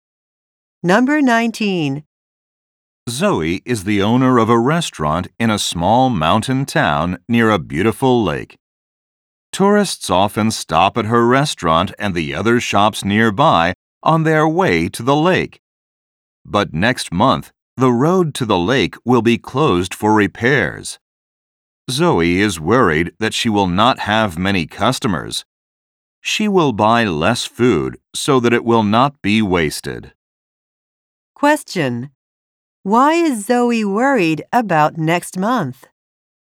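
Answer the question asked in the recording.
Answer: The road to the lake will be closed, so she may not have many customers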